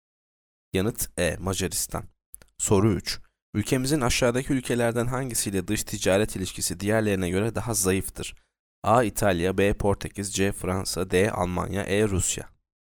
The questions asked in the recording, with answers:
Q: Ülkemizin aşağıdaki ülkelerden hangisiyle dış ticaret ilişkisi diğerlerine göre daha zayıftır?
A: Yanıt B. Portekiz.